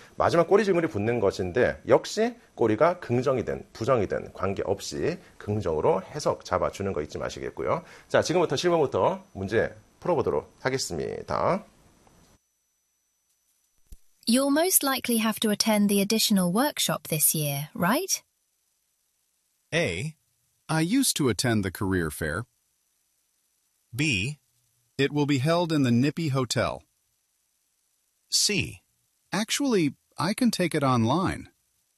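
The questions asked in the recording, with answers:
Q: You'll most likely have to attend the additional workshop this year, right?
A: C: Actually, I can take it online.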